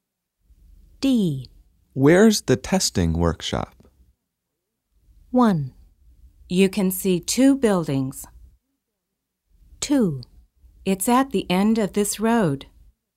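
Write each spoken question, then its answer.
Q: Where's the testing workshop?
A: 2: It's at the end of this road.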